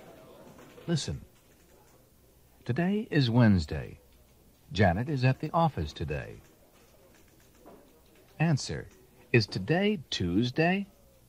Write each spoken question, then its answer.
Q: is today Tuesday?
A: No, it's not.